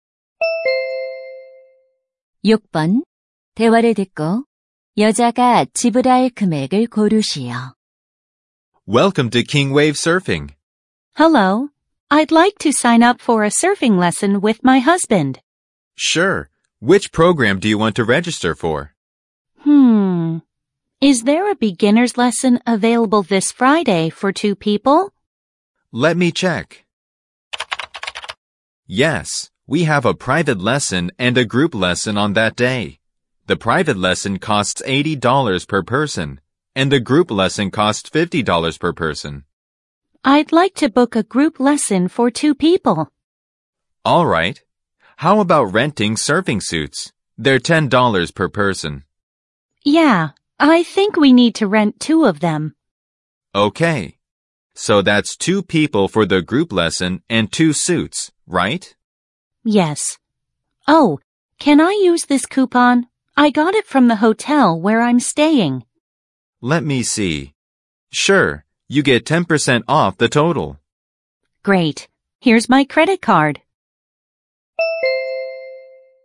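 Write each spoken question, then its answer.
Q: 대화를 듣고 여자가 지불할 금액을 고르시오.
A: 108달러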